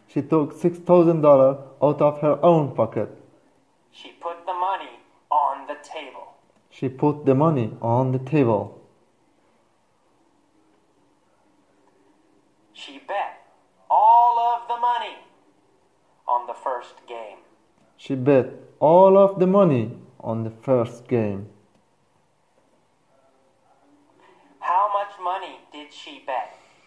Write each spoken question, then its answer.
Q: How much money did she bet?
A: All of it. All $6,000. She bet all $6,000.